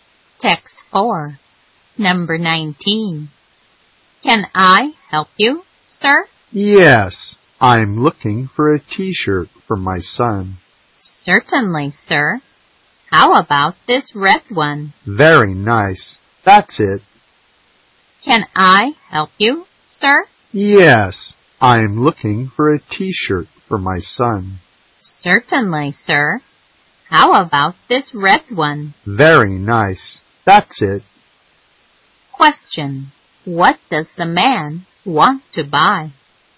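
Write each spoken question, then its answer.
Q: What does the man want to buy?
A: A red T-shirt for his son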